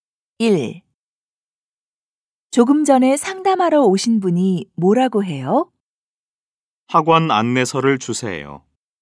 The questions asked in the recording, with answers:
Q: 조금 전에 상담하러 오신 분이 뭐라고 해요?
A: 그분이 학원 안내서를 달라고 해요.